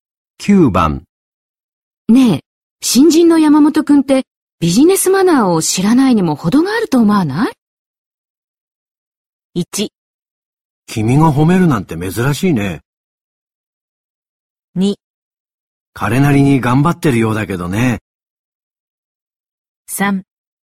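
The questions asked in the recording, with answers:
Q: ねえ、新人の山本くんってビジネスマナーを知らないにも程があると思わない?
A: 2: 彼なりに頑張ってるようだけどね。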